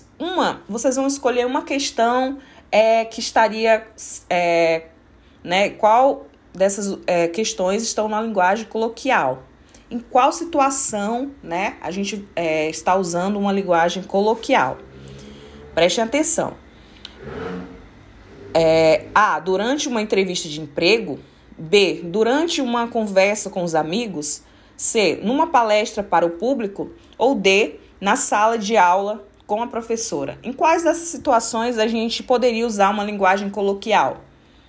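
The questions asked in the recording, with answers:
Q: Em quais dessas situações a gente poderia usar uma linguagem coloquial?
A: B: Durante uma conversa com os amigos.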